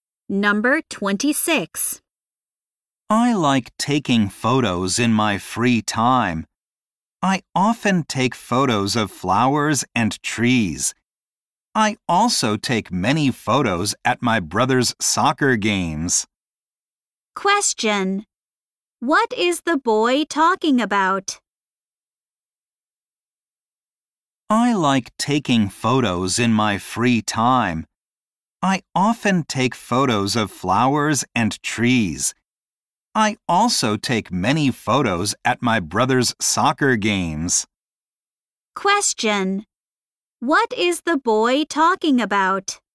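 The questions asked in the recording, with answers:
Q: What is the boy talking about?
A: His hobby: taking photos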